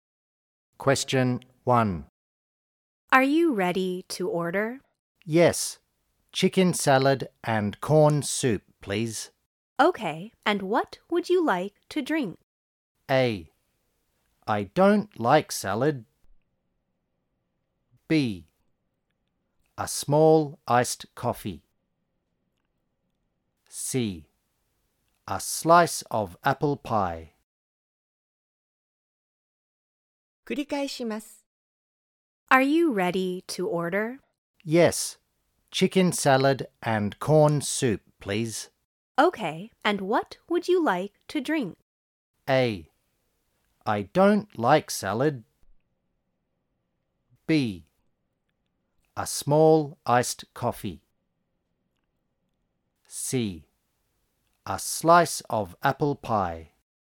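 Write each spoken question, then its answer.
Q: Okay, and what would you like to drink?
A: B: A small iced coffee.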